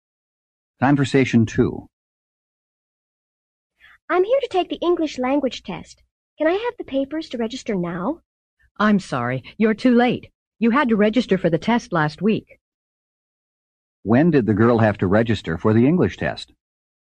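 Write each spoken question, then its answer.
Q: When did the girl have to register for the English test?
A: Last week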